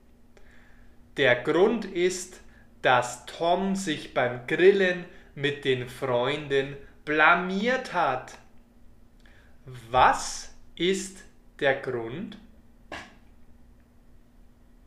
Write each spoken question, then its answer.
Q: Was ist der Grund?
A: Der Grund ist, dass Tom sich blamiert hat.